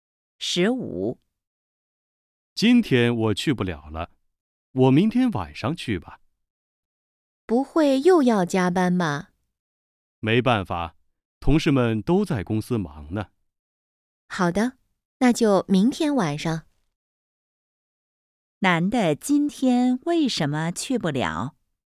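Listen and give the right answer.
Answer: 要加班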